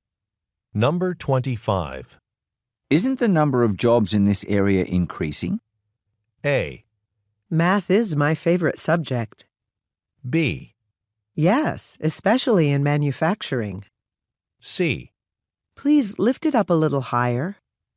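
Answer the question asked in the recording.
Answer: B: Yes, especially in manufacturing.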